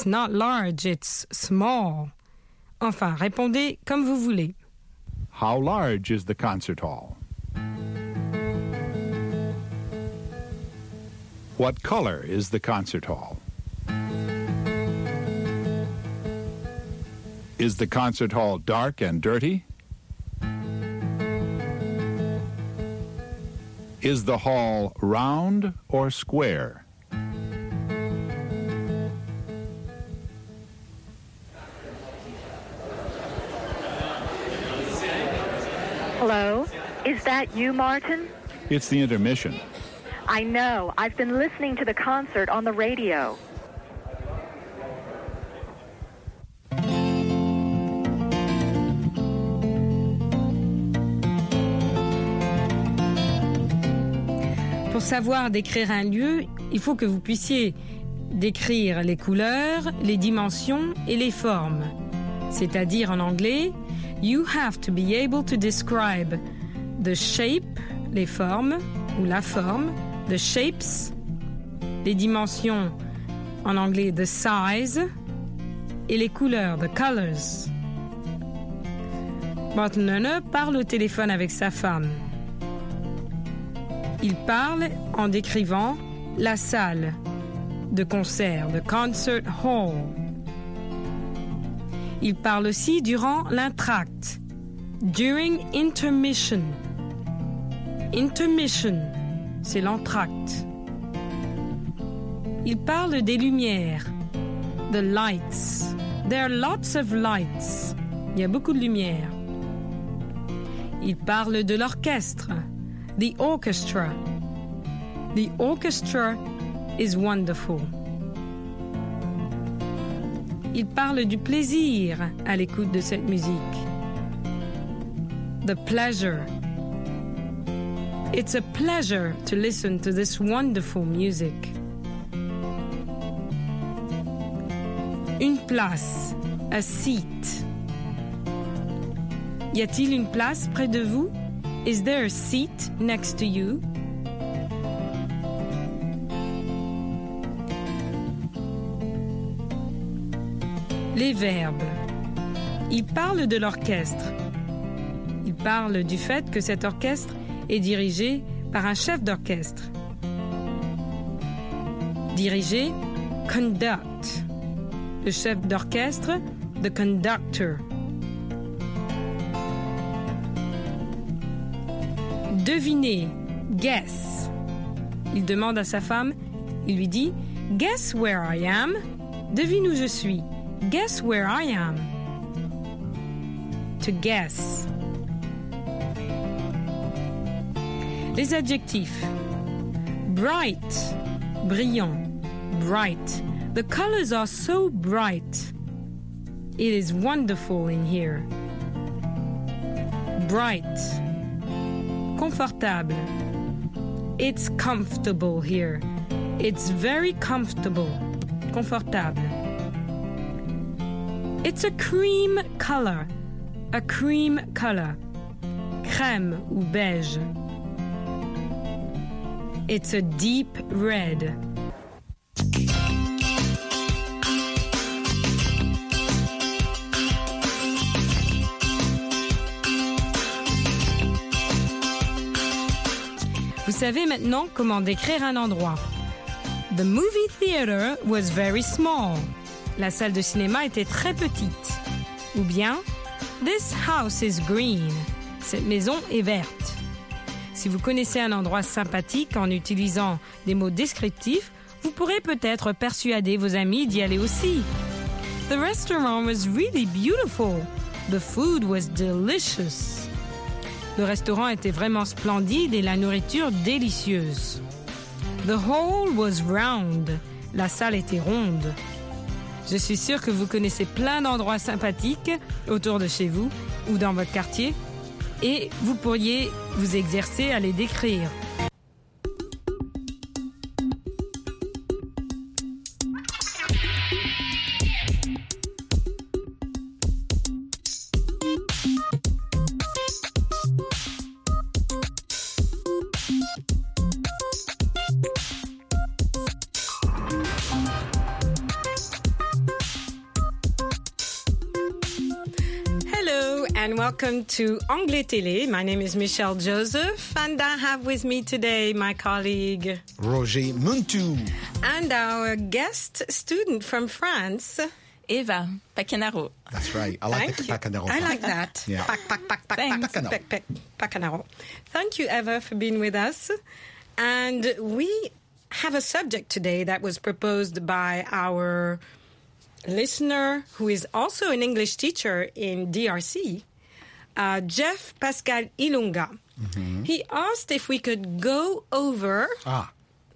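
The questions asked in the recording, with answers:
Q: How large is the concert hall?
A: Large, but not too large

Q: What color is the concert hall?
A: Cream color with red trim

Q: Is the concert hall dark and dirty?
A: No, it's light and colorful now

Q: Is the hall round or square?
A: Almost square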